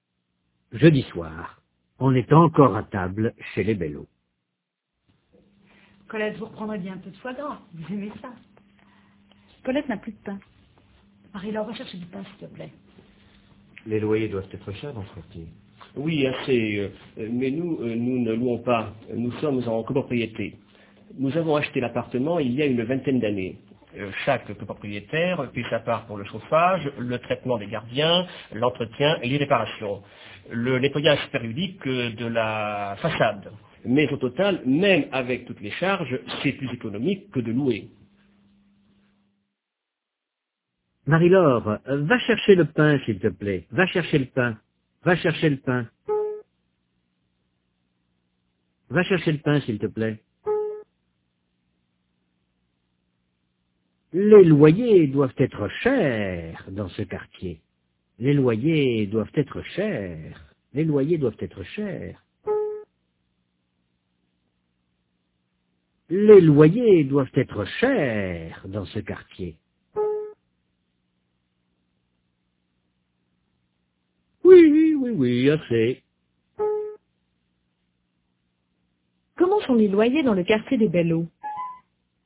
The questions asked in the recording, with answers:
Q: Comment sont les loyers dans le quartier des Bello?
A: Assez cher.